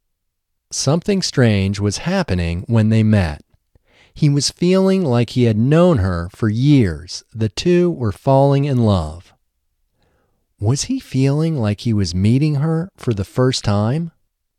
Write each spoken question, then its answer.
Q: Was he feeling like he was meeting her for the first time?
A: No, he wasn't feeling like he was meeting her for the first time.